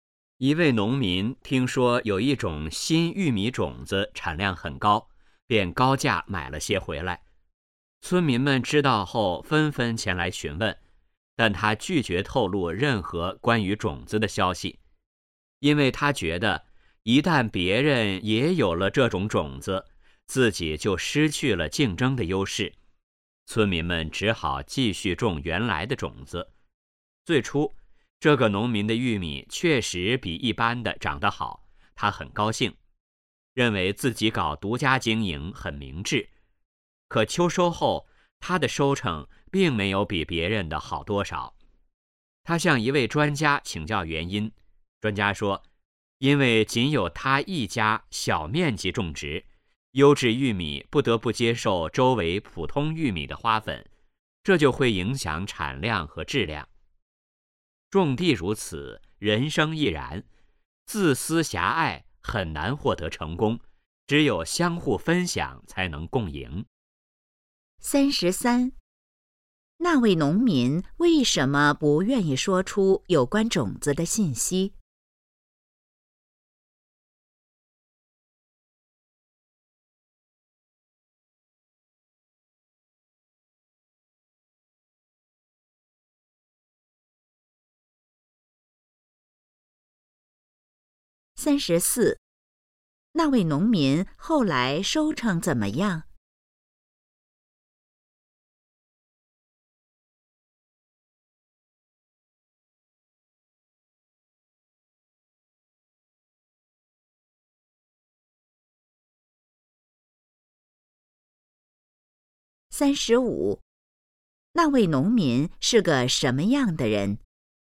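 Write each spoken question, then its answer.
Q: 那位农民为什么不愿意说出有关种子的信息?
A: 怕失去竞争优势

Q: 那位农民后来收成怎么样?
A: 没比别人好多少

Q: 那位农民是个什么样的人?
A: 自私狭隘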